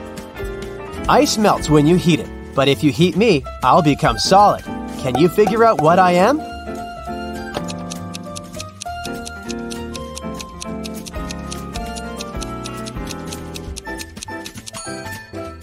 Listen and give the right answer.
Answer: I'm an egg.